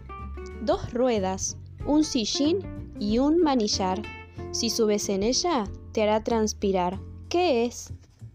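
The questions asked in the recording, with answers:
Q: ¿Qué es?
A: la bicicleta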